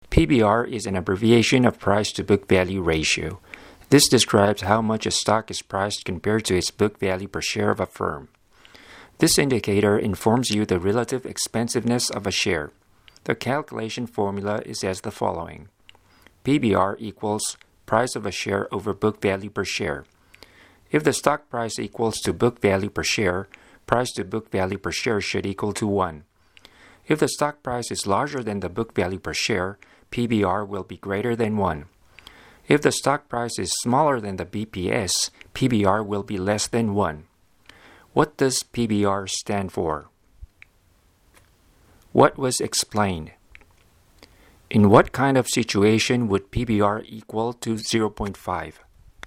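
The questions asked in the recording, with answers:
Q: What does PBR stand for?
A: Price-to-book value ratio

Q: In what kind of situation would PBR equal to 0.5?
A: When the stock price is half the book value per share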